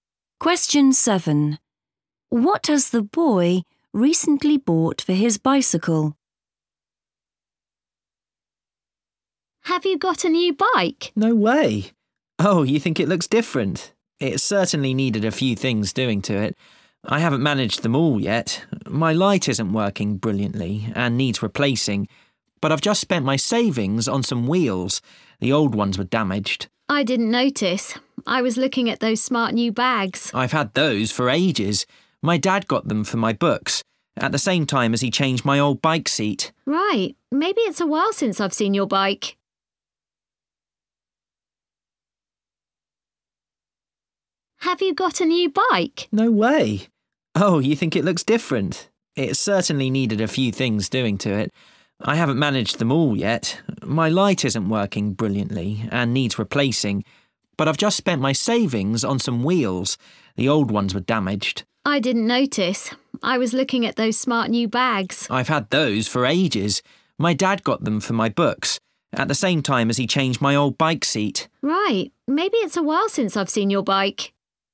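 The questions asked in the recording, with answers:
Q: What has the boy recently bought for his bicycle?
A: wheels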